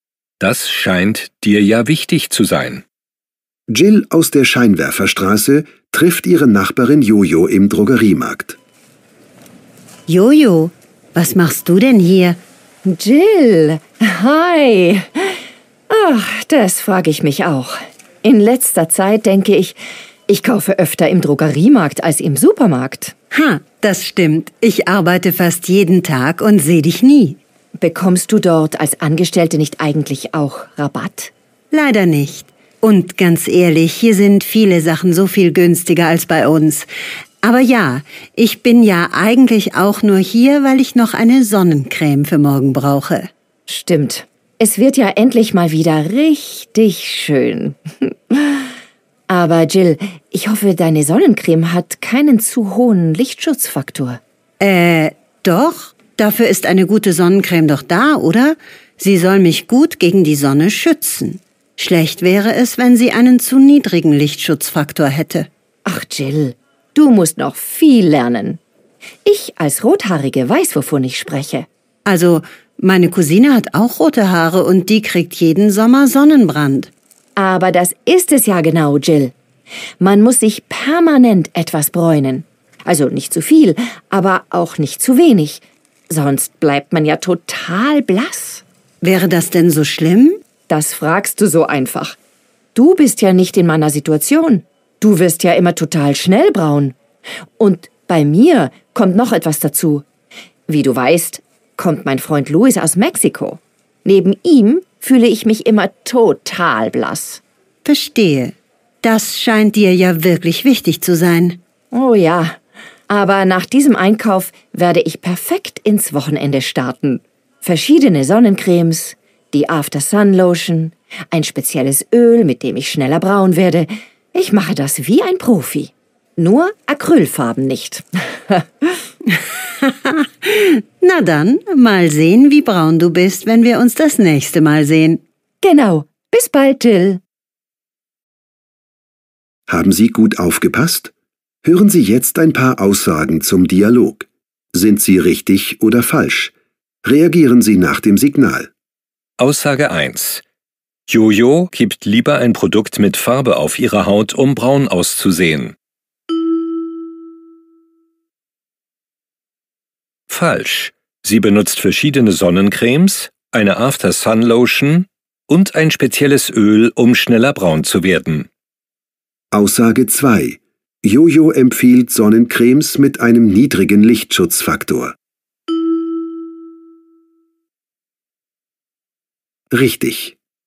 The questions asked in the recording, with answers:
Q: Jojo gibt lieber ein Produkt mit Farbe auf ihre Haut, um braun auszusehen.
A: Falsch.

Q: Jojo empfiehlt Sonnencremes mit einem niedrigen Lichtschutzfaktor.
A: Richtig.